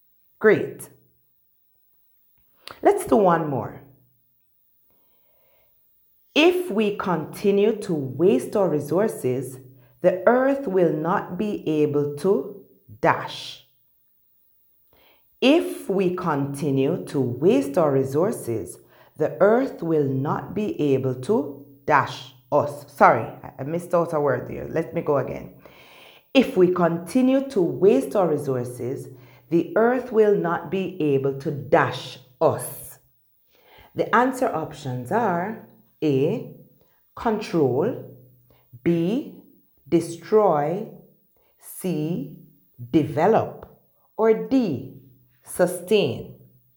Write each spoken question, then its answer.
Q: If we continue to waste our resources, the earth will not be able to dash us.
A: If we continue to waste our resources, the earth will not be able to sustain us.